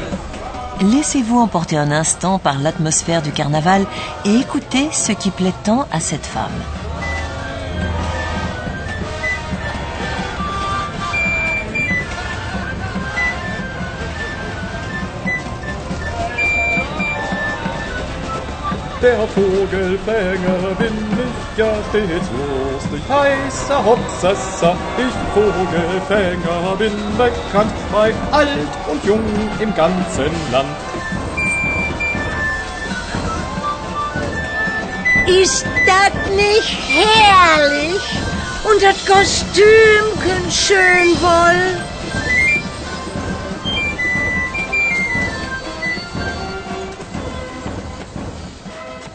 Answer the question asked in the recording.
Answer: Une femme est enchantée par la musique et par le costume à plumes que porte un joyeux luron.